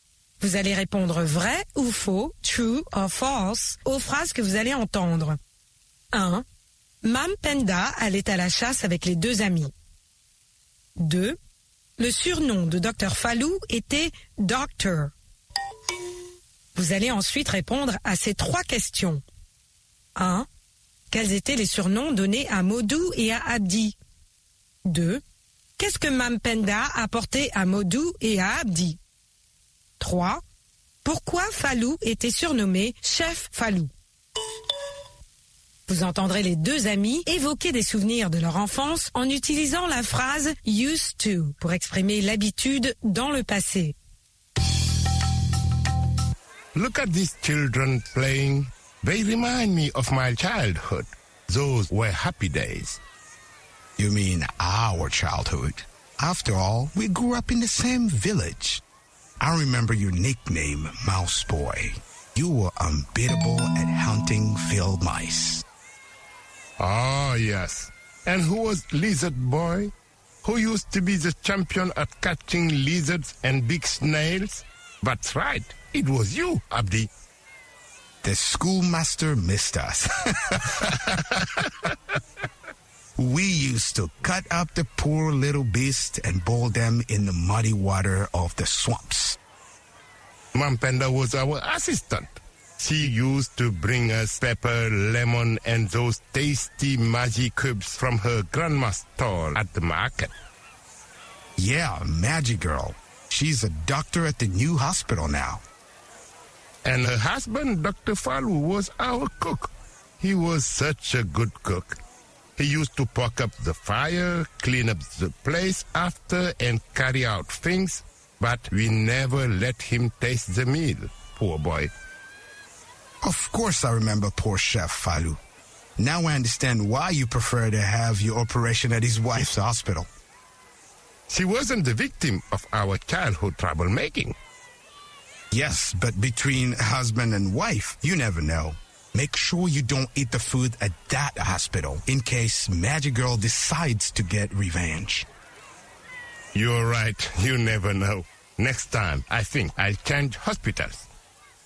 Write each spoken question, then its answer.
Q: Mam Penda allait à la chasse avec les deux amis.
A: L'énoncé 1 est faux.

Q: Le surnom de Dr Falou était Doctor.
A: L'énoncé 2 est faux.

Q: Quels étaient les surnoms donnés à Modou et à Abdi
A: Mice Boy et Lizard Boy.

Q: Qu'est-ce que Mampenda apporté à Modou et à Abdi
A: Mampenda apportait aux deux amis du poivre, du citron et des cubes Maggi.

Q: Pourquoi Falou était surnommé Chef Falou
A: Parce qu'il leur faisait la cuisine.